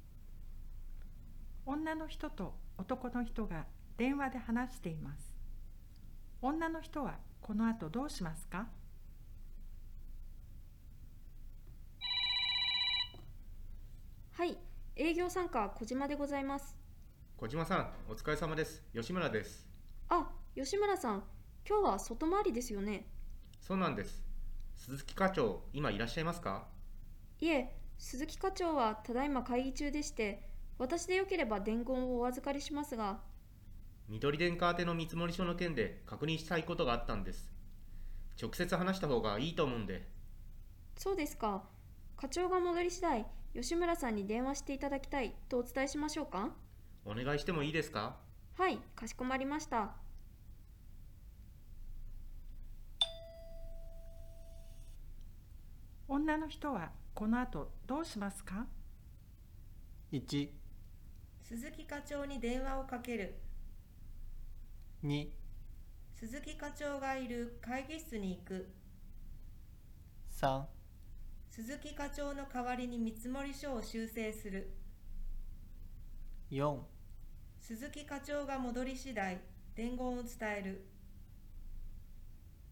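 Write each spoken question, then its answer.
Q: 女の人はこの後どうしますか?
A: 4: 鈴木課長が戻り次第伝言を伝える。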